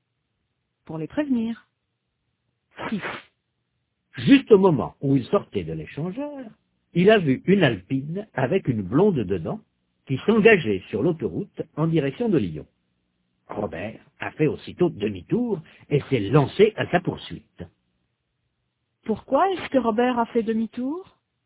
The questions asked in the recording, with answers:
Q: Pourquoi est-ce que Robert a fait demi-tour?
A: Pour se lancer à la poursuite de l'Alpine.